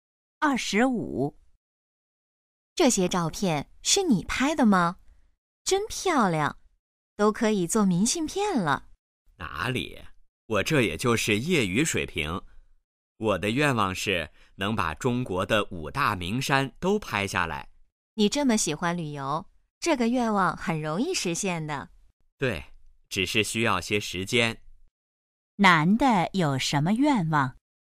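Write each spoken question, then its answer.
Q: 男的有什么愿望?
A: 把中国的5大名山都拍下来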